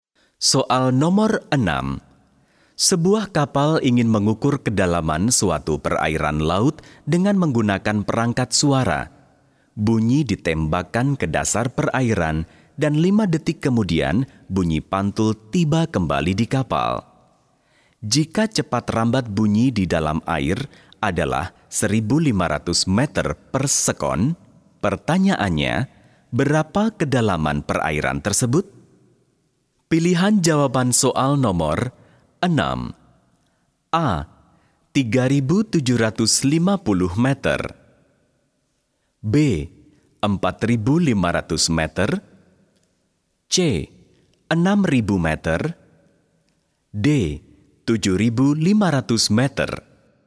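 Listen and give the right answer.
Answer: A: 3.750 meter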